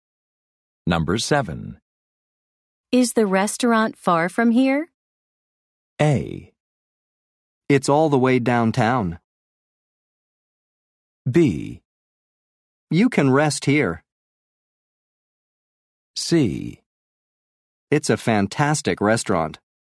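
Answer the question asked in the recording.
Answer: A: It's all the way downtown.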